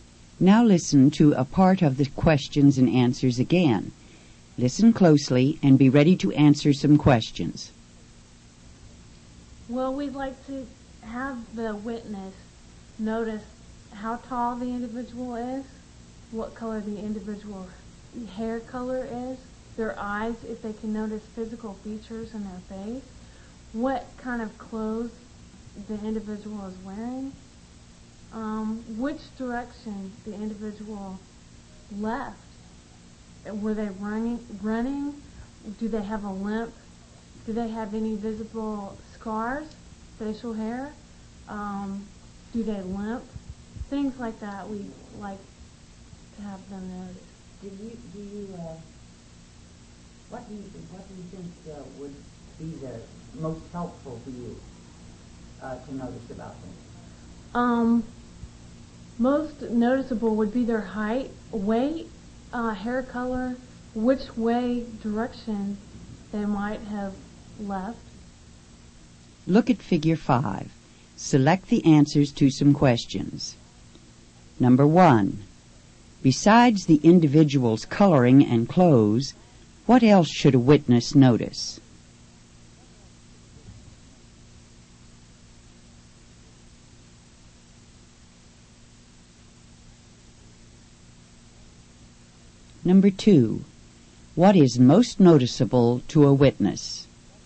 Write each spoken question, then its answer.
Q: Besides the individual's coloring and clothes, what else should a witness notice?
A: Number 1 is B. Besides the individual's coloring and clothes, a witness should notice which direction the individual left.

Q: What is most noticeable to a witness?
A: Number 2 is A. The easiest thing for a witness to notice is the individual's height, weight, and hair color.